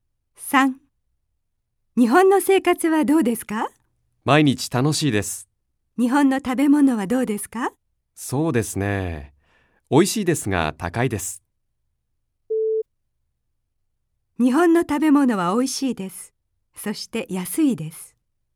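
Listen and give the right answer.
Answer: ×(高いです)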